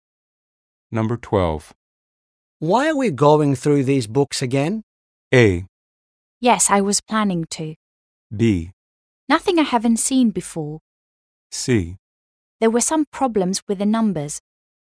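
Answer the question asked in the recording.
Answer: C: There were some problems with the numbers.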